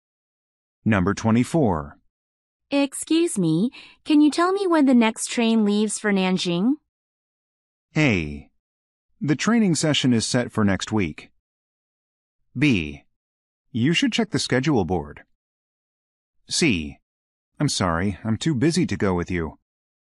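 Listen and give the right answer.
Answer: B: You should check the schedule board.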